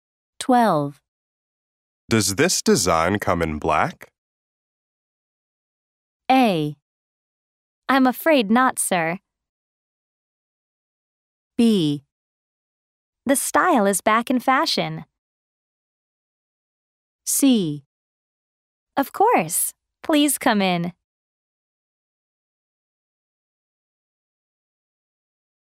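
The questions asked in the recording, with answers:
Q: Does this design come in black?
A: A: I'm afraid not, sir.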